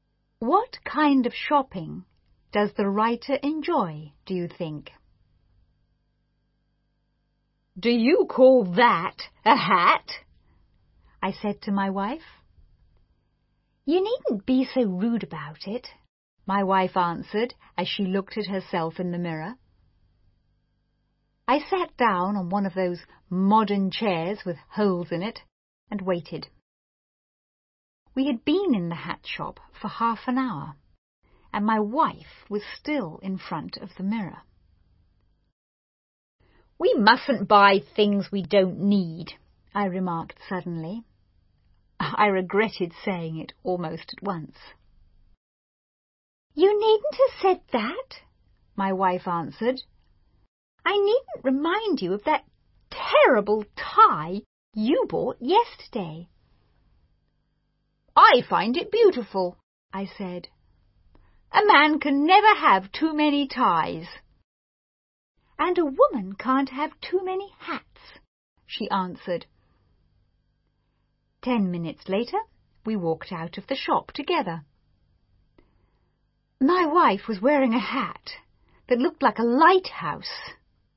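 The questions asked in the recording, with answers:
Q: What kind of shopping does the writer enjoy, do you think?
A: Buying ties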